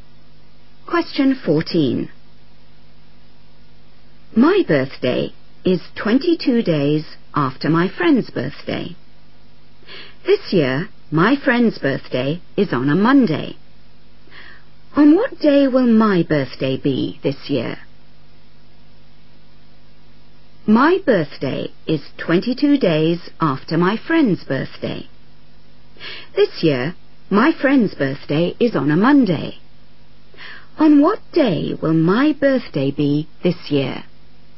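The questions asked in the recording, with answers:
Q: On what day will my birthday be this year?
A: Tuesday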